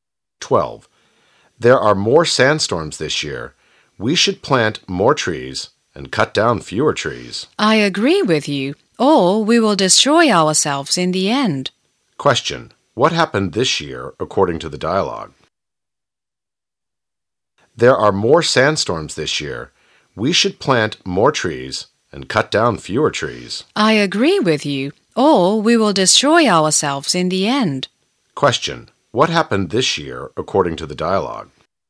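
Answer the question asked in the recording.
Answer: There were more sandstorms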